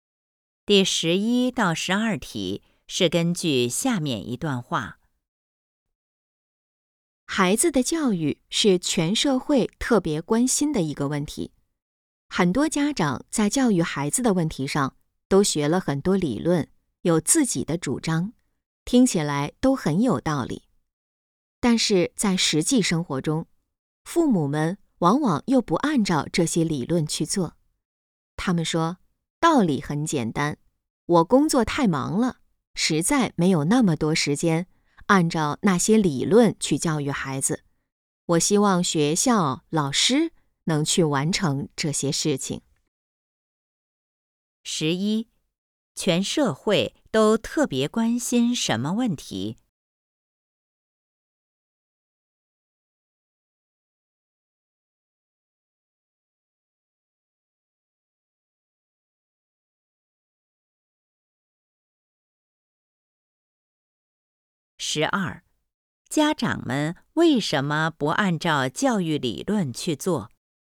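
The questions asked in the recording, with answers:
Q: 全社会都特别关心什么问题?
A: 孩子的教育

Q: 家长们为什么不按照教育理论去做?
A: 工作太忙,没有时间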